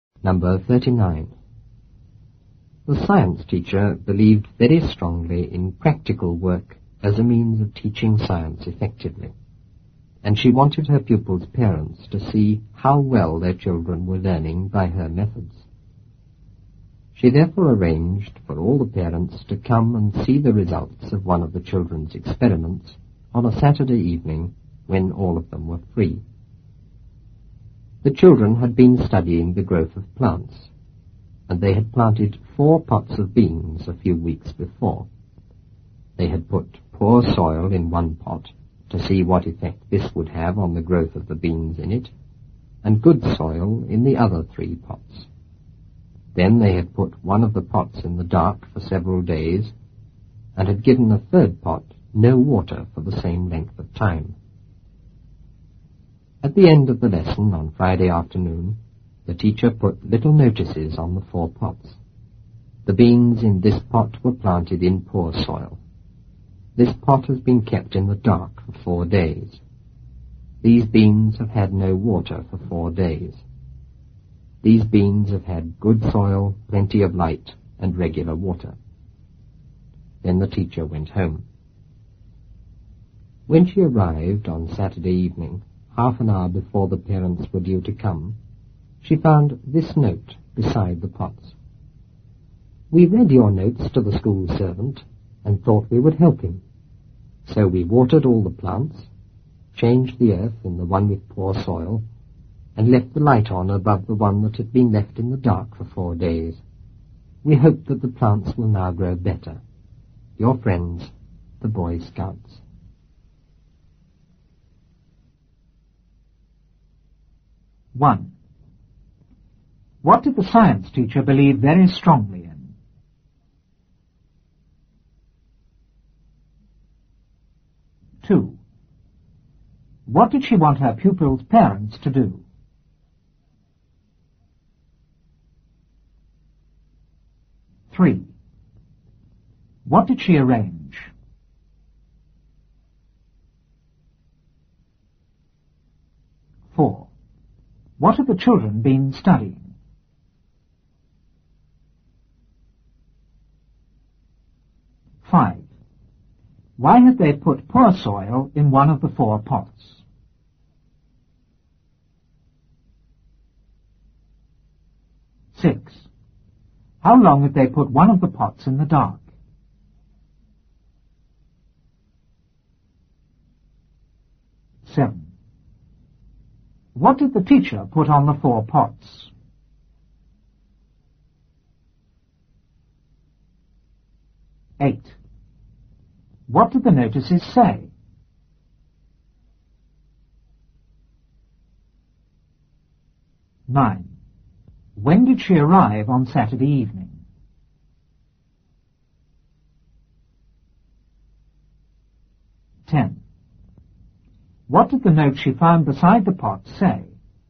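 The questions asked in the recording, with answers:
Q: What did the science teacher believe very strongly in?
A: Practical work as a means of teaching science effectively

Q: What did she want her pupils' parents to do?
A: To see how well their children were learning by her methods

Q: What did she arrange?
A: For all the parents to come and see the results of one of the children's experiments on a Saturday evening

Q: What have the children been studying?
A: The growth of plants

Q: Why have they put poor soil in one of the 4 pots?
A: To see what effect it would have on the growth of the beans

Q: How long have they put one of the pots in the dark?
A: For several days (4 days)

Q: What did the teacher put on the 4 pots?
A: Little notices

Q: What did the notices say?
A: Poor soil; kept in the dark for 4 days; no water for 4 days; good soil, plenty of light and regular water

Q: When did she arrive on Saturday evening?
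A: Half an hour before the parents were due to come

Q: What did the note she found beside the pot say?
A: The Boy Scouts had watered all the plants, changed the poor soil and left the light on above the dark pot, hoping they would grow better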